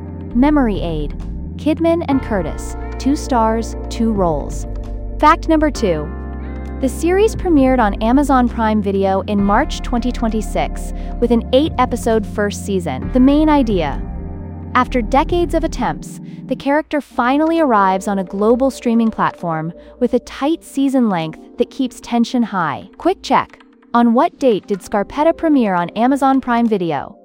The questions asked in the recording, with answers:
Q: On what date did Scarpetta premiere on Amazon Prime Video?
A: March 2026.